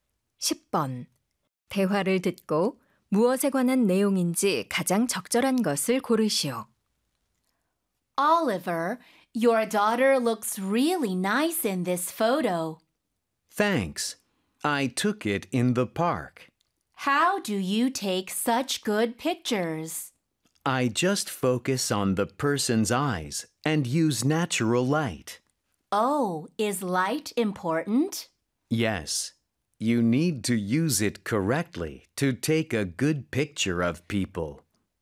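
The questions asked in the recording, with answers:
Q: 대화를 듣고 무엇에 관한 내용인지 가장 적절한 것을 고르시오.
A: 인물 사진을 잘 찍는 방법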